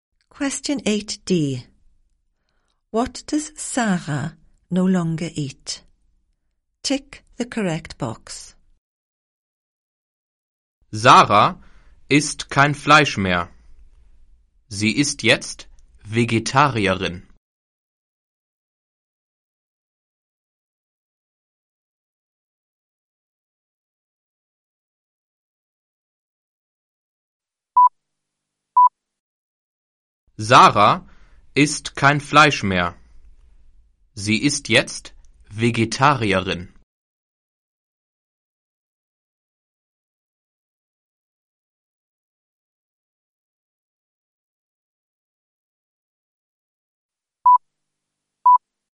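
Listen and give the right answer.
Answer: Meat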